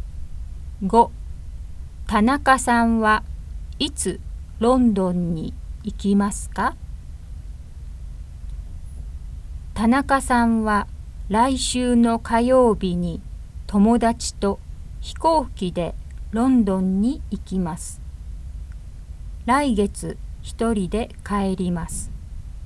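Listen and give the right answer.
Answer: 来週の火曜日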